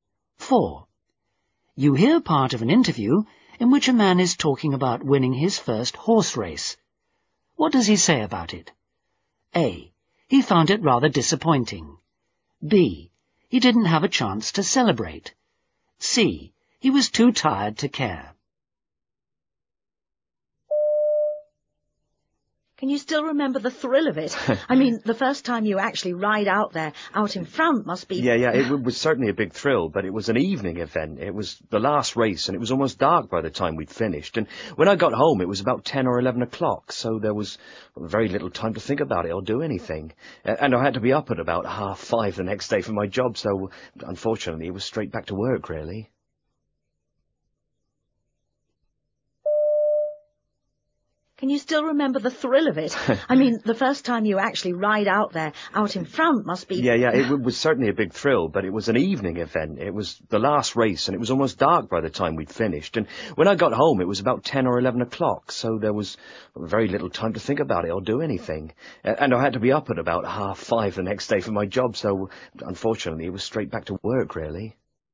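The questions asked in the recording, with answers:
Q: What does he say about it?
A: B: He didn't have a chance to celebrate.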